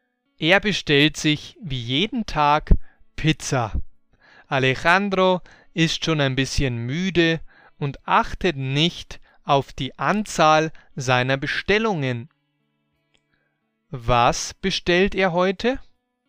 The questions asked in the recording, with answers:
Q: Was bestellt er heute?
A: Pizza wie jeden Tag.